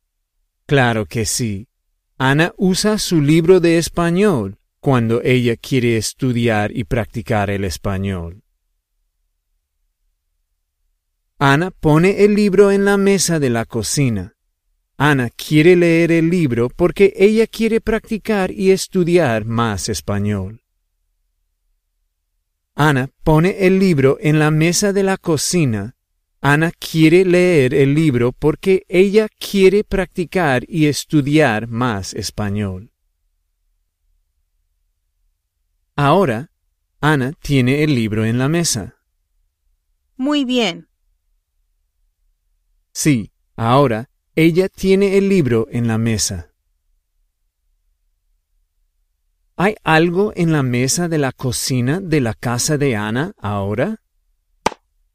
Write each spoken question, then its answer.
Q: ¿Hay algo en la mesa de la cocina de la casa de Ana ahora?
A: Sí, el libro de español está en la mesa de la cocina de su casa.